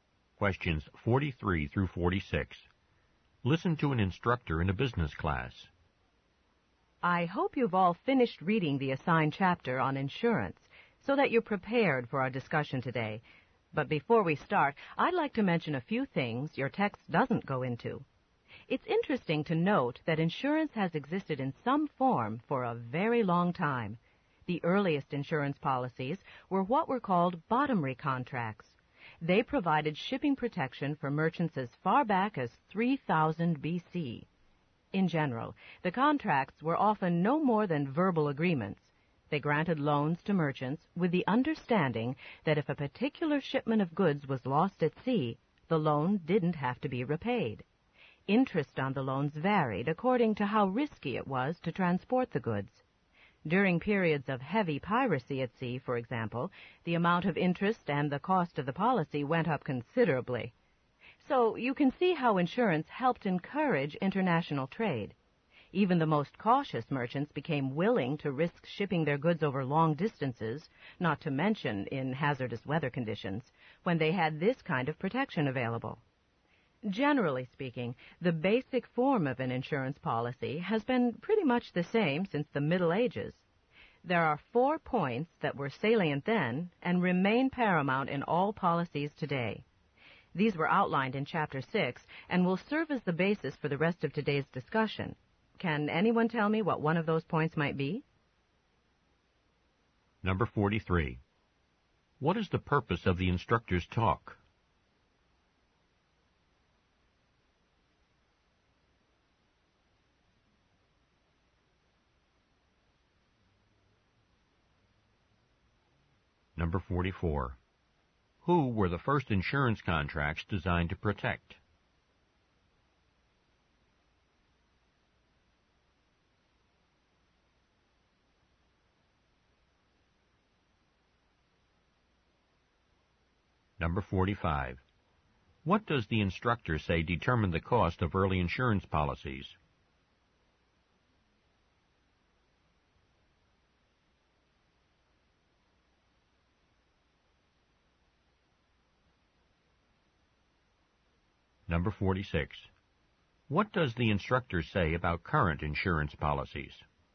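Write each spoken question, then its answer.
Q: Who were the first insurance contracts designed to protect?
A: Merchants shipping goods

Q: What does the instructor say determined the cost of early insurance policies?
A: How risky it was to transport the goods

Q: What does the instructor say about current insurance policies?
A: Their basic form is the same as in the Middle Ages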